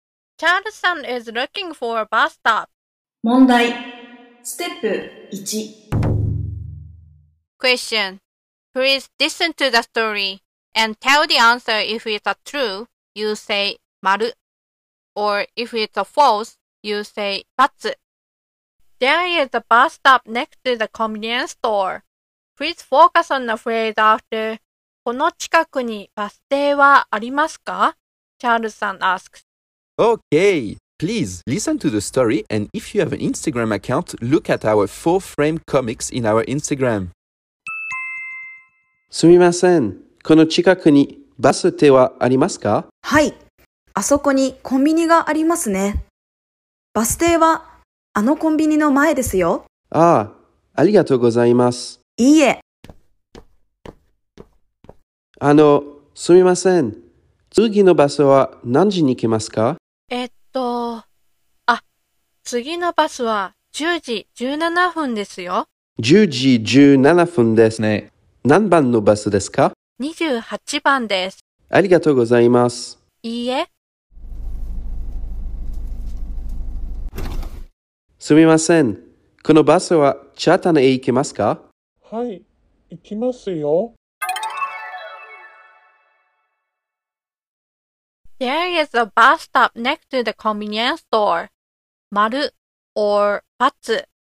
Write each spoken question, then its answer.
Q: There is a bus stop next to the convenience store.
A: So it's Batsu.